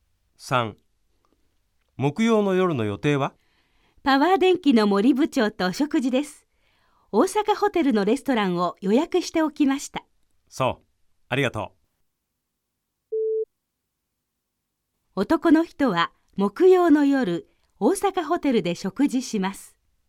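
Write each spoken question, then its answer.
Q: 男の人は木曜の夜、大阪ホテルで食事します。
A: 〇(正しい)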